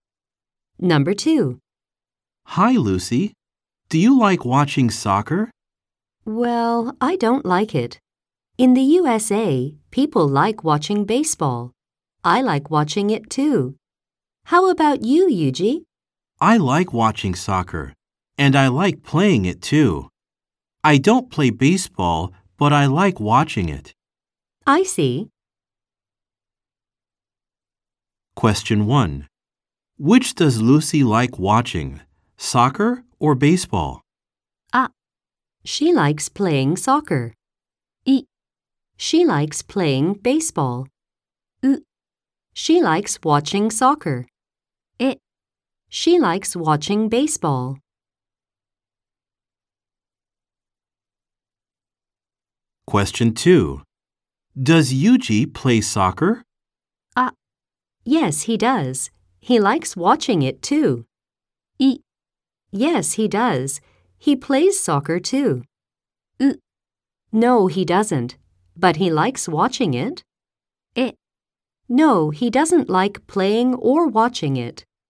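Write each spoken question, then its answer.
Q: Which does Lucy like watching, soccer or baseball?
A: え: She likes watching baseball.

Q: Does Yuji play soccer?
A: あ: Yes, he does. He likes watching it too.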